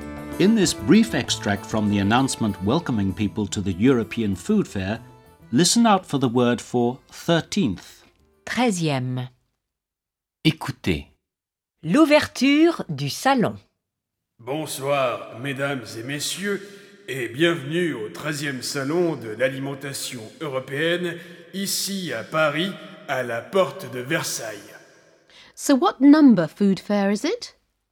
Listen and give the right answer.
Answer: It's the 13th food fair.